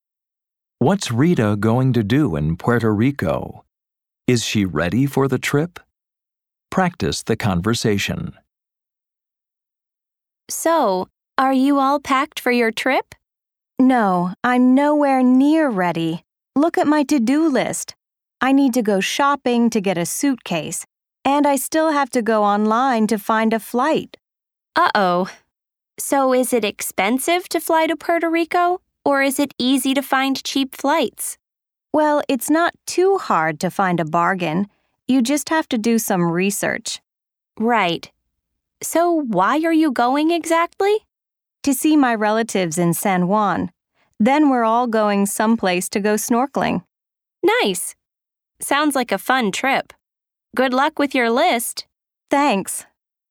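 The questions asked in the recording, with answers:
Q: What's Rita going to do in Puerto Rico?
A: See her relatives in San Juan and go snorkeling

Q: Is she ready for the trip?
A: No, she's nowhere near ready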